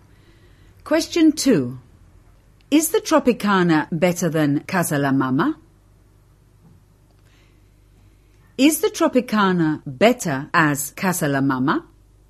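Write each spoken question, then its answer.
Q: Is the Tropicana better than Casa La Mama?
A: A: Is the Tropicana better than Casa La Mama?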